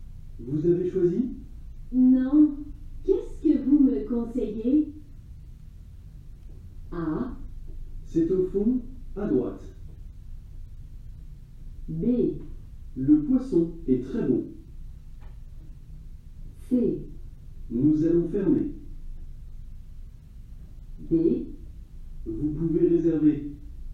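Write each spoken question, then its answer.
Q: Non. Qu'est-ce que vous me conseillez?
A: B: Le poisson est très bon.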